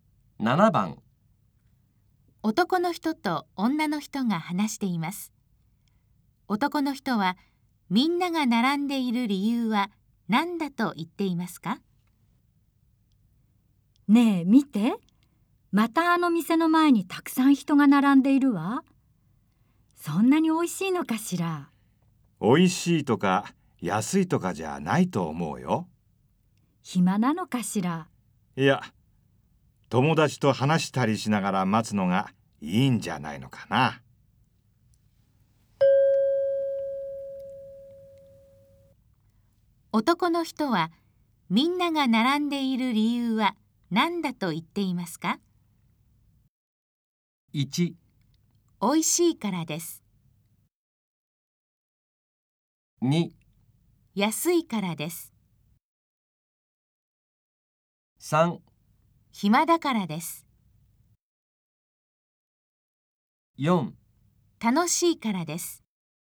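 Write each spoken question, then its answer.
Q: 男の人はみんなが並んでいる理由は何だと言っていますか?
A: 4: 楽しいからです。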